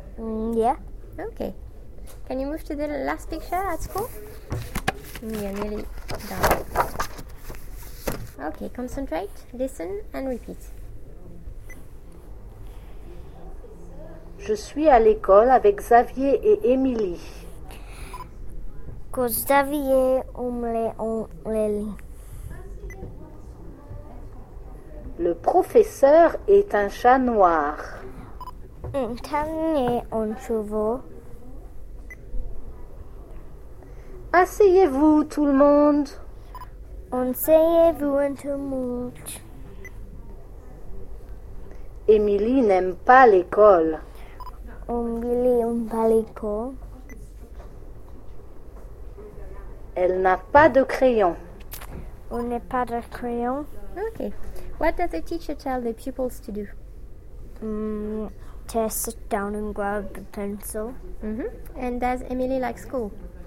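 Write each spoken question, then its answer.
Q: What does the teacher tell the pupils to do?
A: Sit down

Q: And does Émilie like school?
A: No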